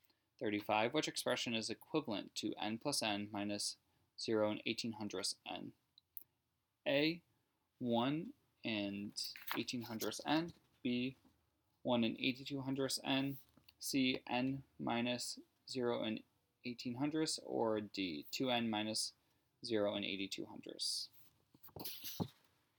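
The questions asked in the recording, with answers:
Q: Which expression is equivalent to n plus n minus 0 and 18 hundredths n?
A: B: 1 and 82 hundredths n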